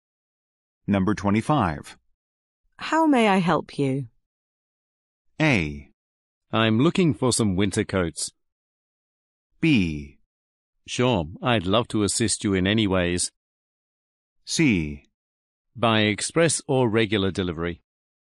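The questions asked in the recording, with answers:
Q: How may I help you?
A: A: I'm looking for some winter coats.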